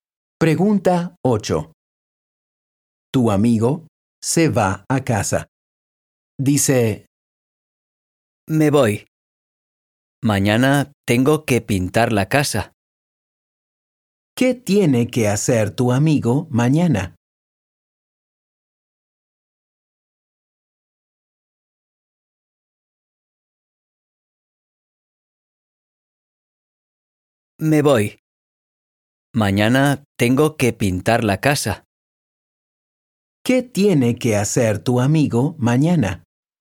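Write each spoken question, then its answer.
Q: ¿Qué tiene que hacer tu amigo mañana?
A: Pintar la casa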